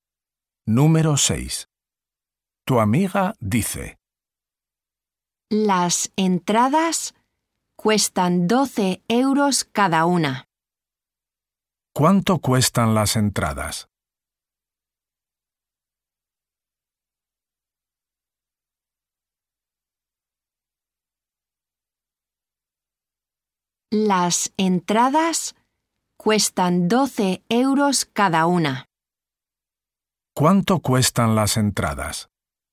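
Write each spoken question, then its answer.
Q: ¿Cuánto cuestan las entradas?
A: 12 euros cada una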